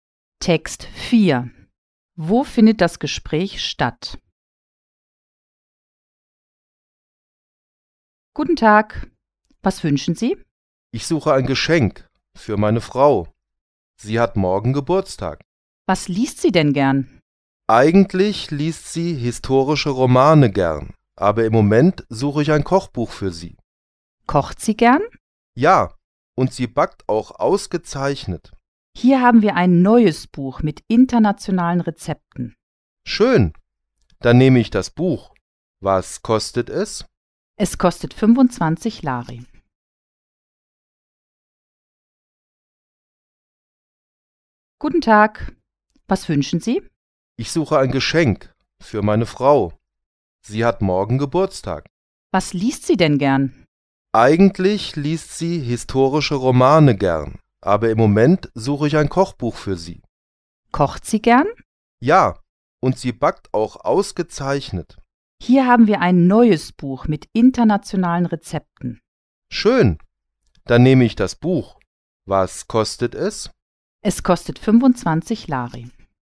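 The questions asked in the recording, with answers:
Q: Wo findet das Gespräch statt?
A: In einer Buchhandlung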